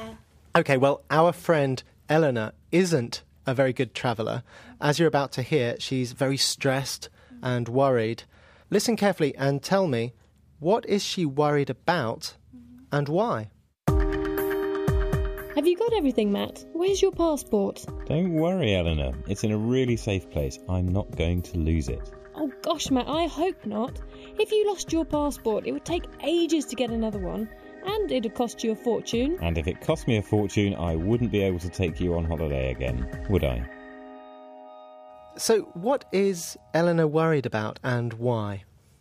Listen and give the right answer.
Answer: Eleanor's worried about Matt losing his passport. She thinks it would take a lot of time and money to get a new one.